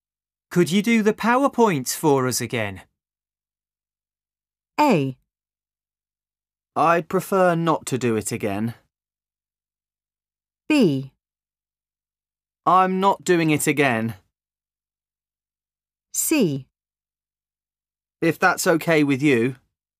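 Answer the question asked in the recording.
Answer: A: I'd prefer not to do it again.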